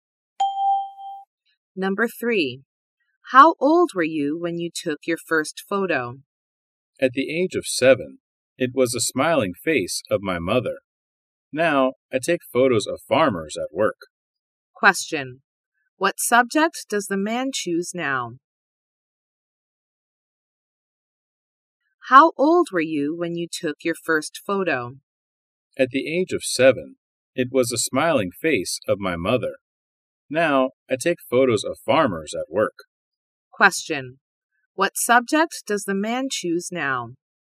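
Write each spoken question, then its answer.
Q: What subject does the man choose now?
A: Farmers at work.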